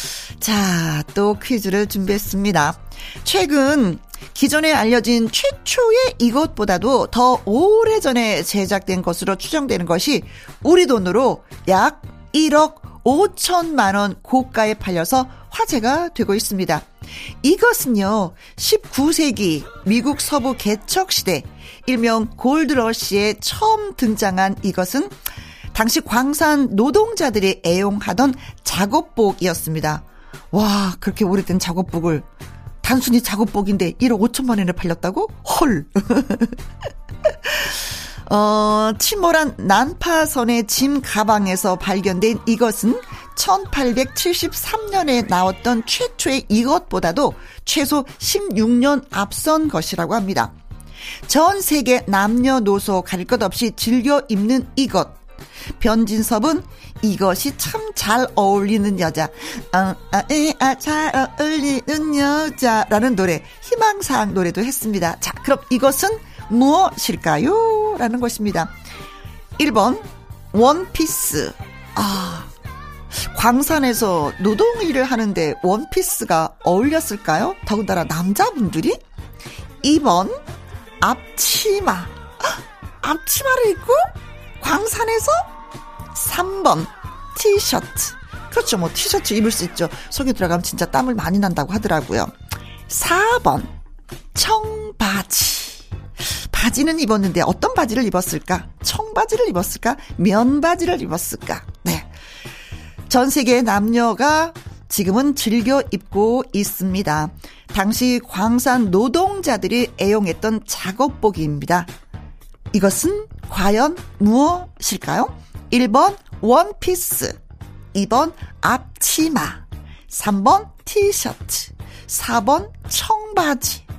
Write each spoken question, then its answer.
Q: 당시 광산 노동자들이 애용했던 작업복입니다. 이것은 과연 무엇일까요?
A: 정답은 그렇습니다. 청, 바, 치, 오!